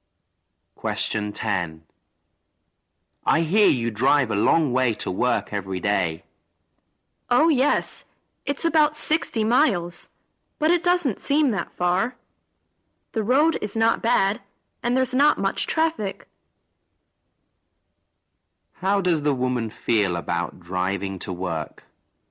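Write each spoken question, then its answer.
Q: How does the woman feel about driving to work?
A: She doesn't mind it; it doesn't seem that far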